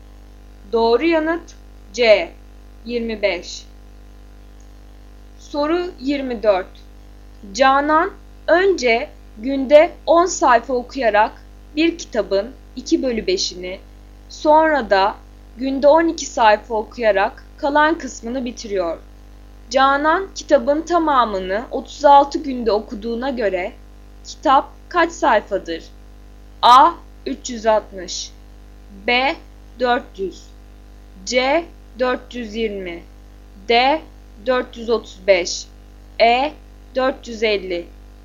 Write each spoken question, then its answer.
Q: Canan kitabın tamamını 36 günde okuduğuna göre kitap kaç sayfadır?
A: Doğru yanıt B 400.